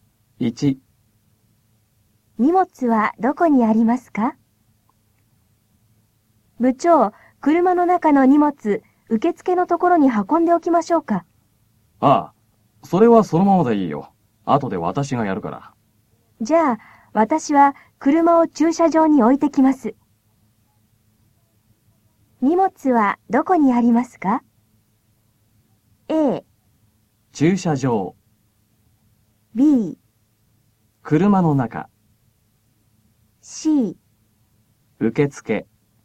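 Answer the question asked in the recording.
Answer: B: 車の中。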